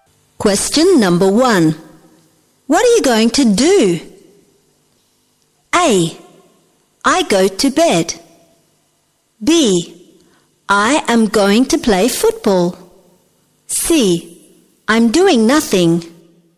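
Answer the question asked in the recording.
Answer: B: I am going to play football.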